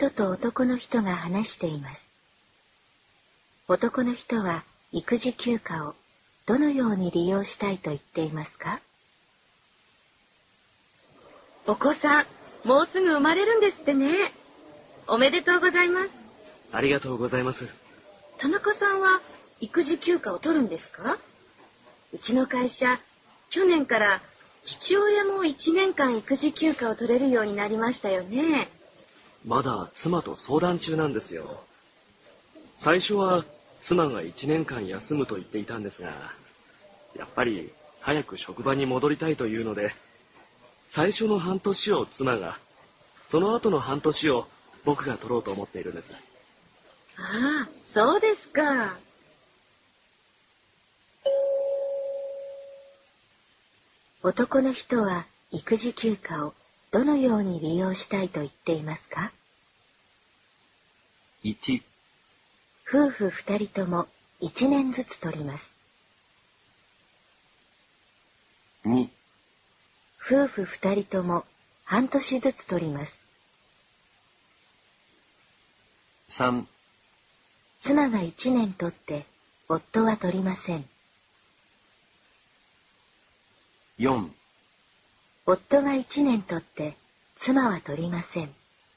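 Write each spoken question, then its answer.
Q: 男の人は育児休暇をどのように利用したいと言っていますか?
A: 2: 夫婦2人とも半年ずつ取ります。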